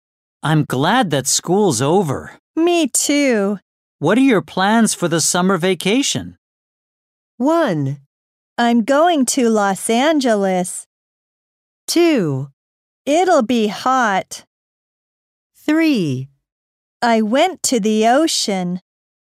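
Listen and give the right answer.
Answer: 1: I'm going to Los Angeles.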